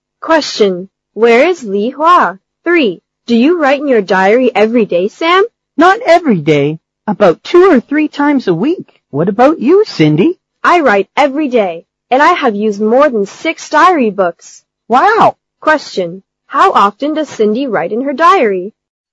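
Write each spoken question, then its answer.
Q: Question. How often does Cindy write in her diary?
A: Every day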